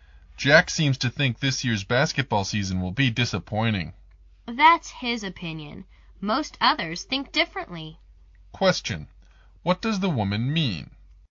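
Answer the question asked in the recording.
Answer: Most people don't think the season will be disappointing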